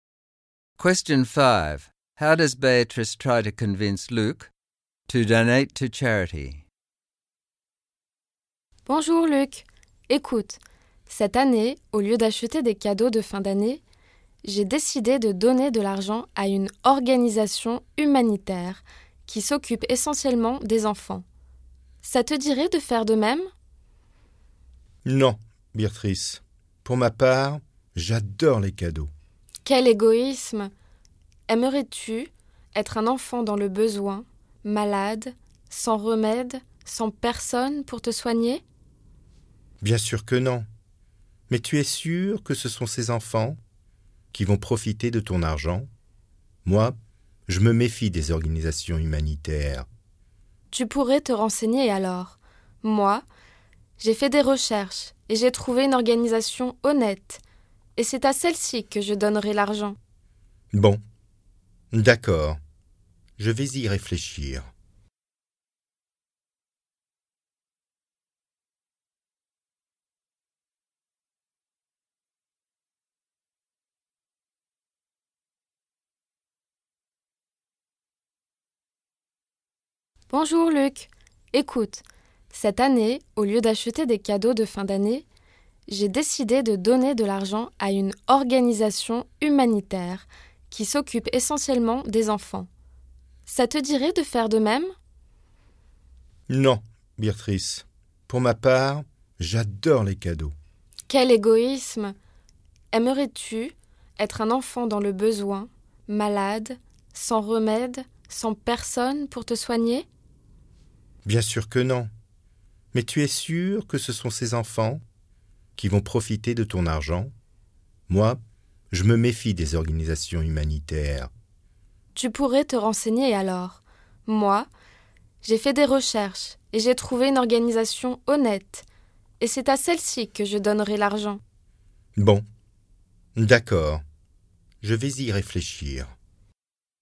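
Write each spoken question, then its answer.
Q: How does Beatrice try to convince Luke to donate to charity?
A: She calls him selfish and asks him to imagine being a sick child in need with no one to care for him; when he says he doesn't trust charities, she tells him to look into them and says she has found an honest one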